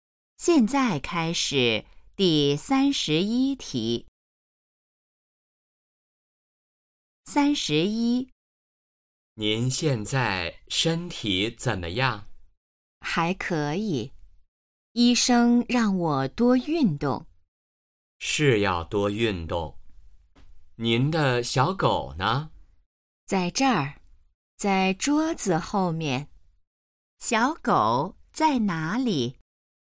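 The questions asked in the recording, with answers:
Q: 小狗在哪里?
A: 桌子后面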